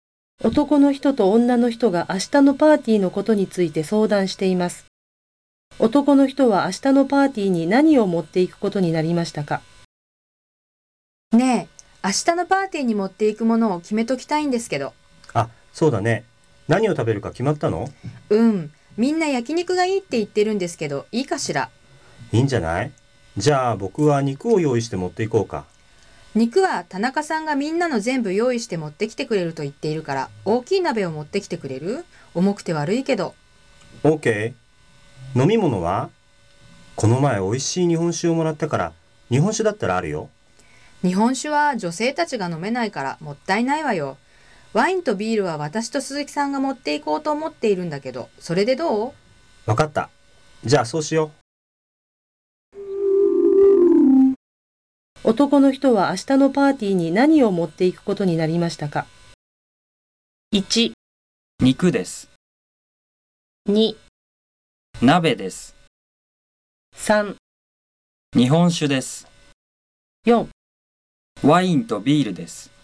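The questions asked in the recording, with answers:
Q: 男の人は明日のパーティーに何を持っていくことになりましたか?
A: 2: 鍋です。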